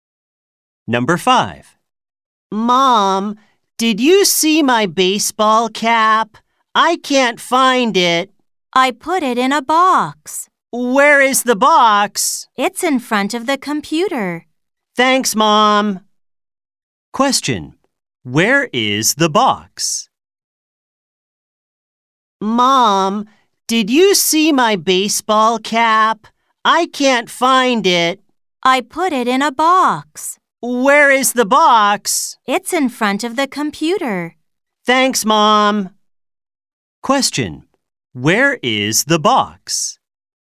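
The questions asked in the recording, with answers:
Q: Where is the box?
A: In front of the computer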